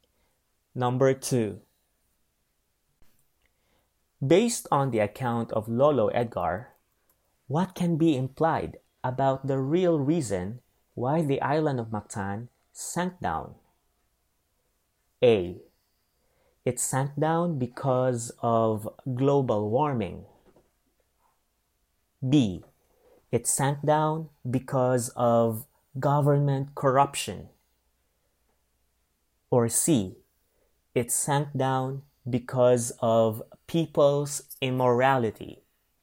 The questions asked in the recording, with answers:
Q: Based on the account of Lolo Edgar, what can be implied about the real reason why the island of Mactan sank down?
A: The correct answer is A. It sank down because of global warming.